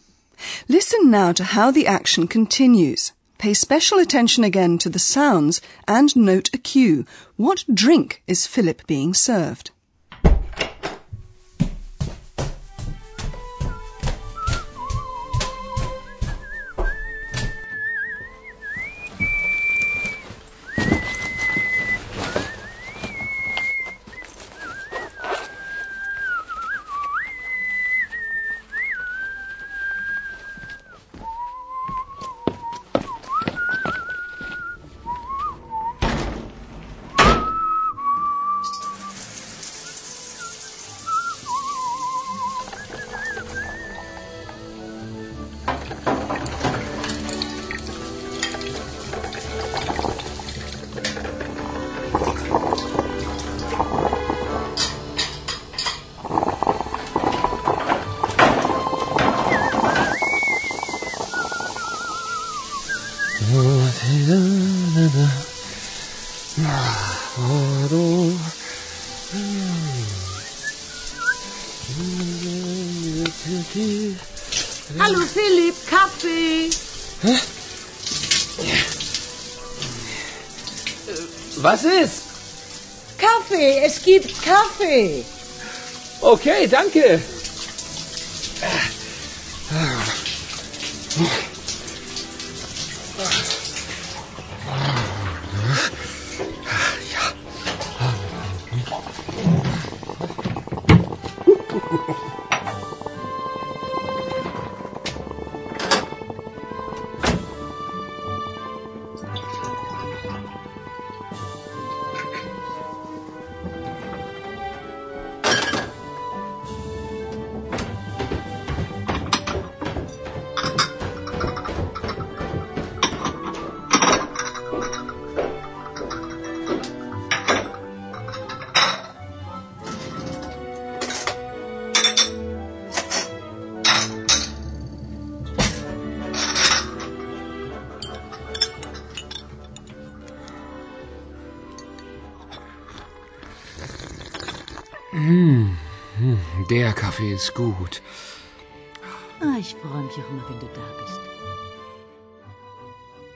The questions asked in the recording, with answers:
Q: What drink is Philip being served?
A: he's treated to coffee by Hannah